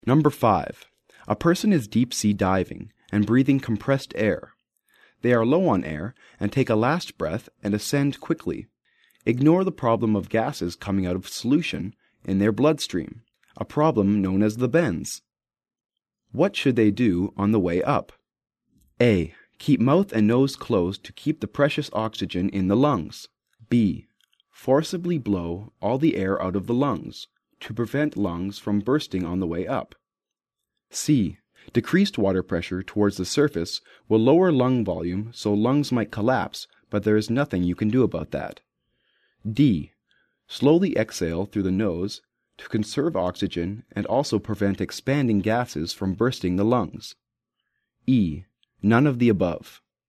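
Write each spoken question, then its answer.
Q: What should they do on the way up?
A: D: Slowly exhale through the nose to conserve oxygen and also prevent expanding gases from bursting the lungs.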